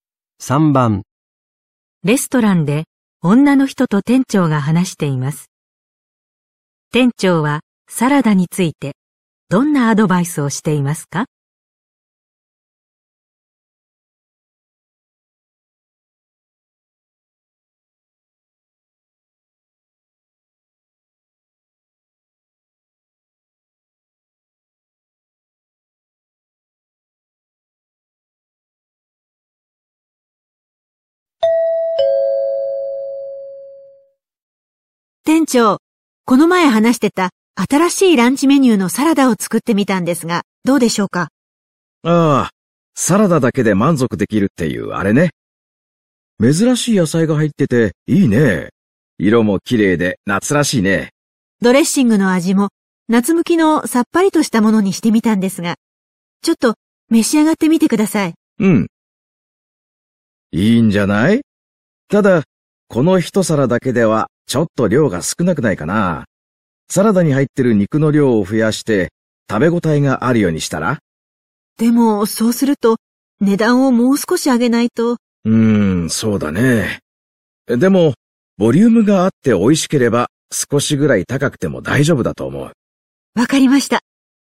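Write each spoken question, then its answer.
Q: 店長はサラダについてどんなアドバイスをしていますか?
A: 肉の量を増やして食べ応えがあるようにする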